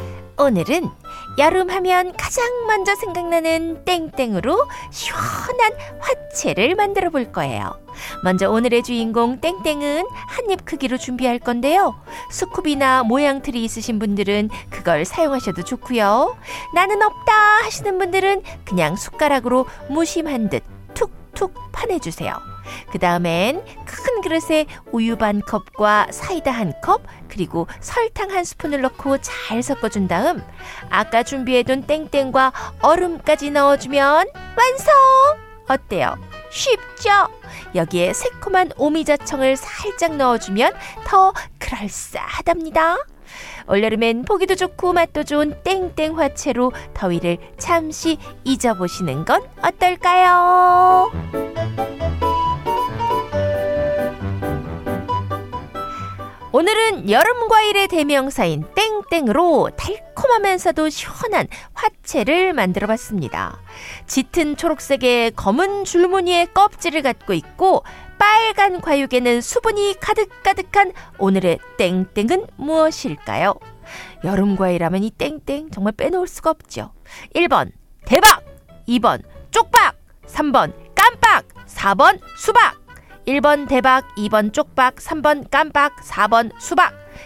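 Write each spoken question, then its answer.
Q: 짙은 초록색의 검은 줄무늬의 껍질을 갖고 있고 빨간 과육에는 수분이 가득가득한 오늘의 땡땡은 무엇일까요?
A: 4: 수박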